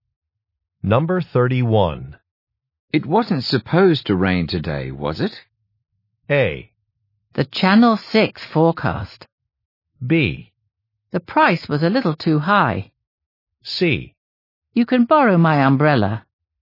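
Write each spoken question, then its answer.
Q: It wasn't supposed to rain today, was it?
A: C: You can borrow my umbrella.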